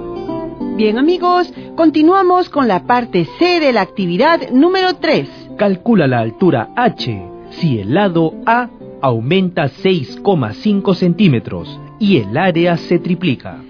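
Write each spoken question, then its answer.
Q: Calcula la altura H si el lado A aumenta 6,5 centímetros y el área se triplica.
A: 4,32 centímetros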